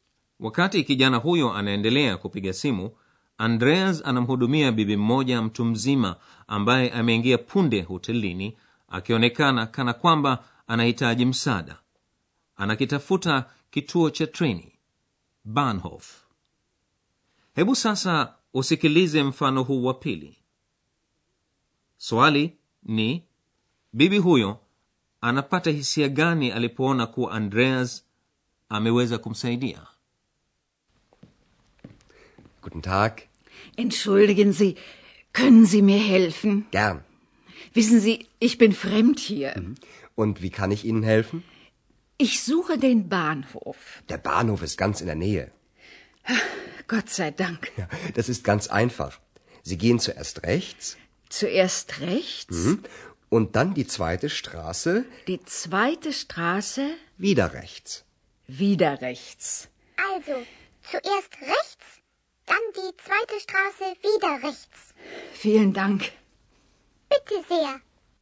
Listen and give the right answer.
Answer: bibi huyo anapumua andreas anapoweza kumsaidia anasema namshukuru mungu